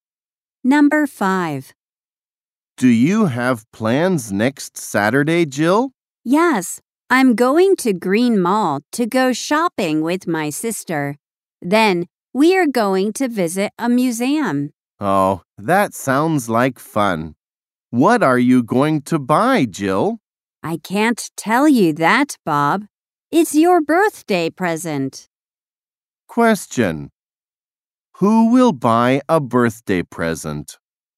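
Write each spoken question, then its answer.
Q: Who will buy a birthday present?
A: Jill.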